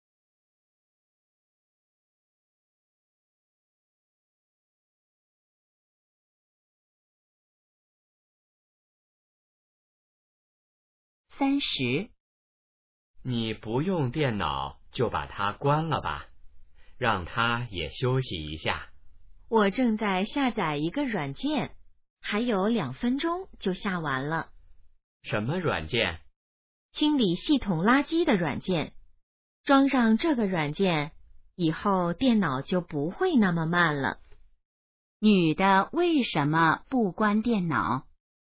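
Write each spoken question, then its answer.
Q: 女的为什么不关电脑?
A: 正在下载软件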